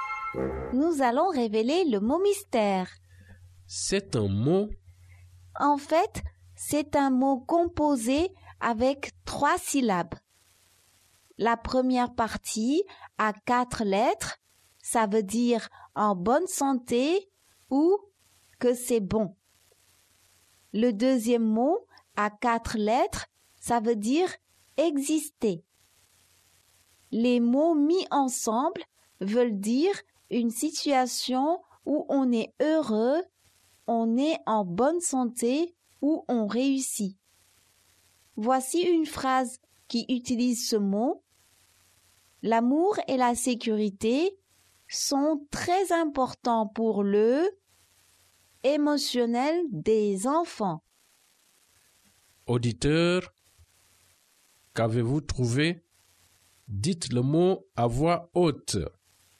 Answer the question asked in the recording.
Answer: Le mot mystère est bien-être.